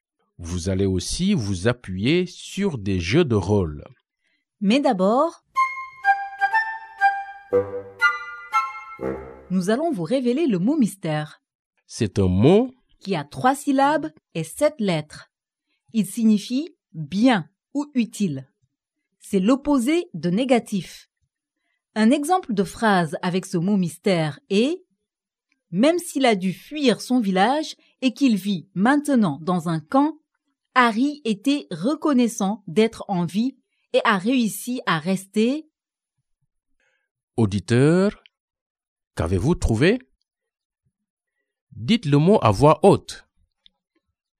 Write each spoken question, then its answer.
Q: Auditeur, qu'avez-vous trouvé?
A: Le mot mystère d'aujourd'hui est « positif ».